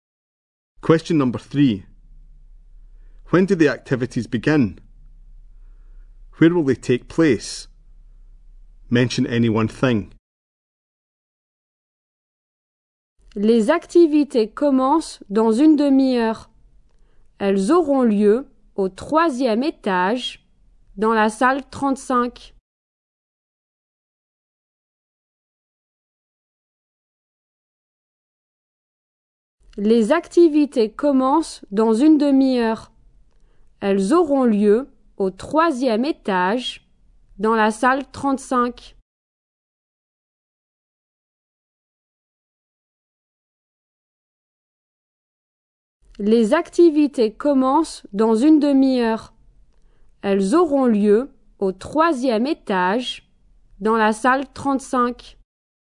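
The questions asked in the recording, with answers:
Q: When do the activities begin?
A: In half an hour

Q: Where will they take place?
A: On the third floor, in room 35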